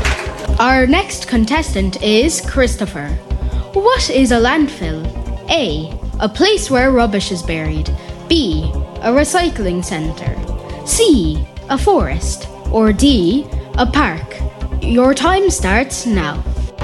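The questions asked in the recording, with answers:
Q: What is a landfill?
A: A: A place where rubbish is buried.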